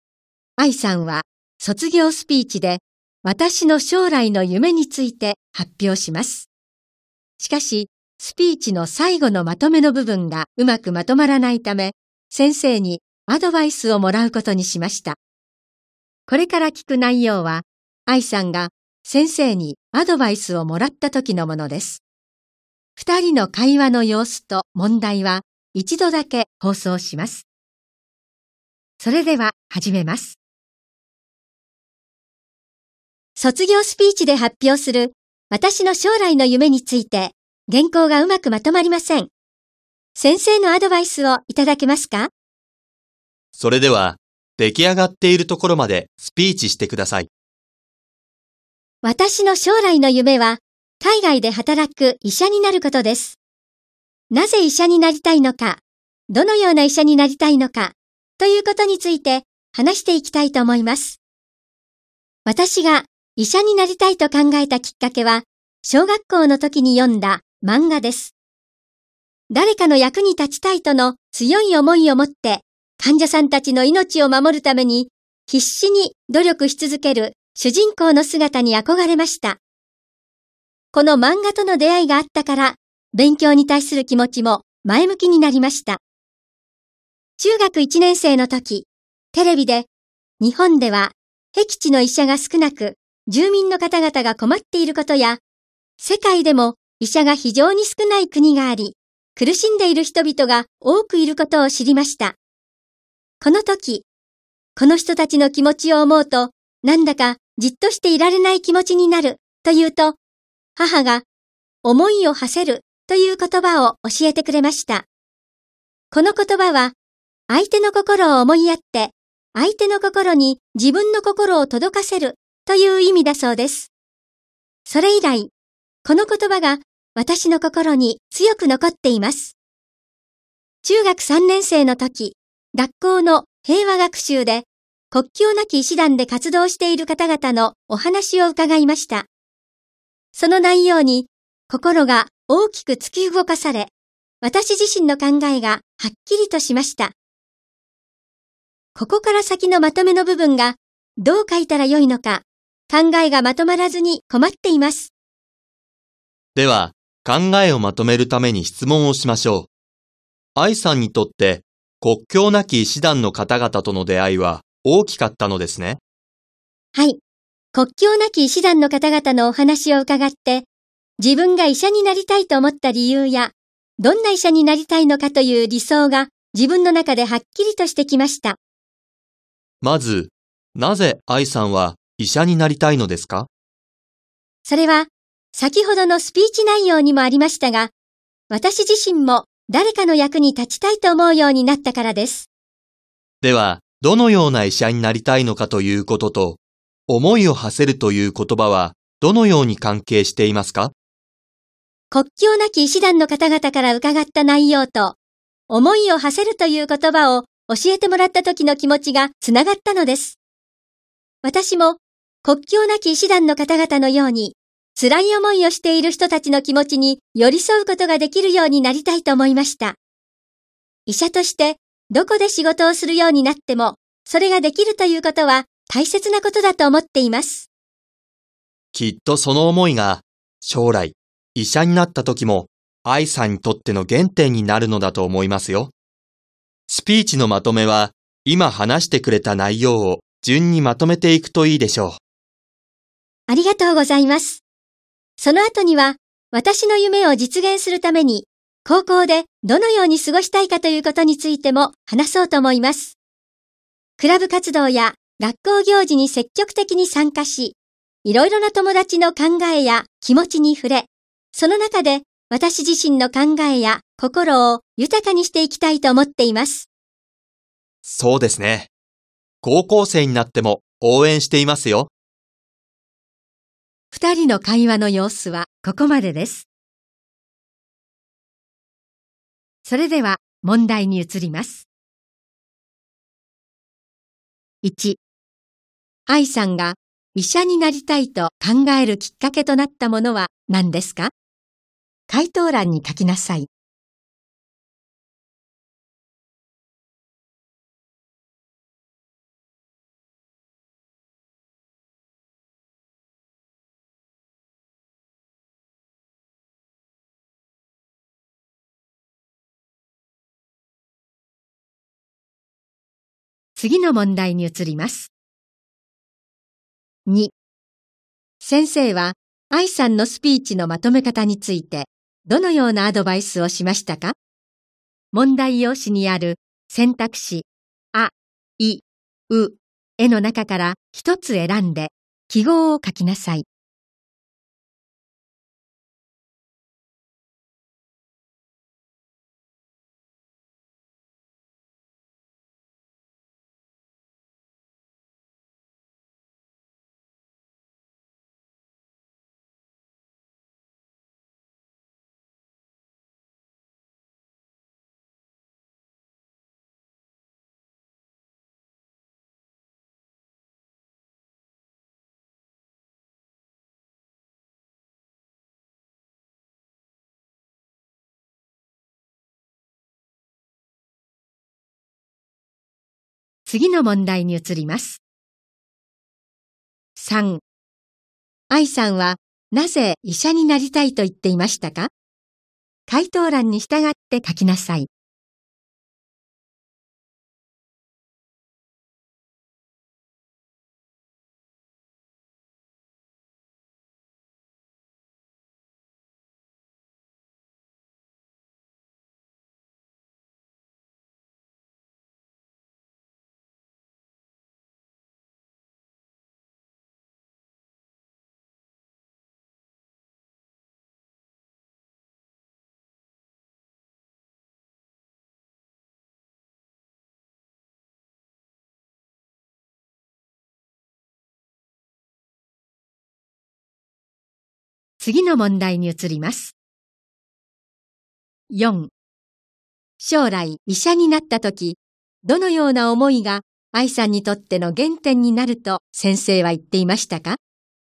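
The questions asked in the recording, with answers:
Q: 愛さんが 医者になりたいと考えるきっかけとなったものは何ですか?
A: 小学校の時に読んだ漫画

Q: 愛さんはなぜ医者になりたいと言っていましたか?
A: 自分も誰かの役に立ちたいと思うようになったから

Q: 将来医者になったとき、どのような思いが愛さんにとっての原点になると先生は言っていましたか?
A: 辛い思いをしている人たちの気持ちに寄り添いたいという思い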